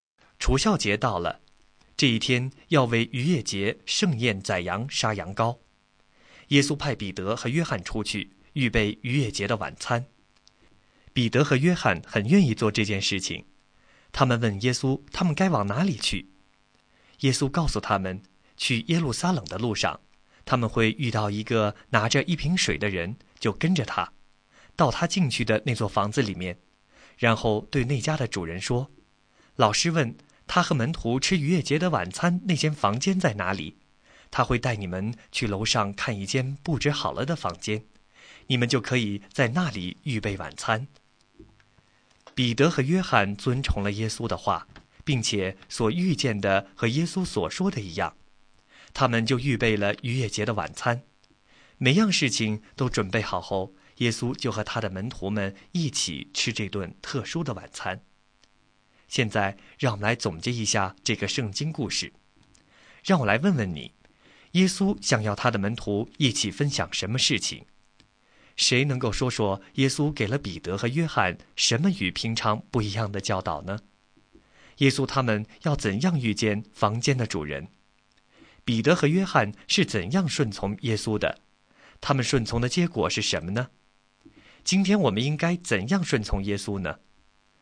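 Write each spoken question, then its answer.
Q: 耶稣想要他的门徒一起分享什么事情?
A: 逾越节的晚餐

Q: 谁能够说说耶稣给了彼得和约翰什么与平常不一样的教导呢?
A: 跟着拿着一瓶水的人到他进去的房子,问主人吃逾越节晚餐的房间在哪里

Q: 耶稣他们要怎样遇见房间的主人?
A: 跟着拿着一瓶水的人进入那座房子

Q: 彼得和约翰是怎样顺从耶稣的?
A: 照耶稣的话去做,预备了逾越节的晚餐

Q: 他们顺从的结果是什么呢?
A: 所遇见的和耶稣所说的一样,预备好了晚餐,和耶稣一起吃了晚餐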